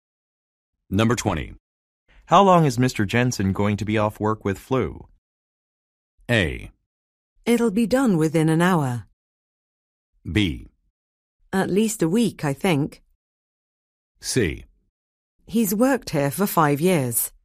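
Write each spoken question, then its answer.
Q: How long is Mr. Jensen going to be off work with flu?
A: B: At least a week, I think.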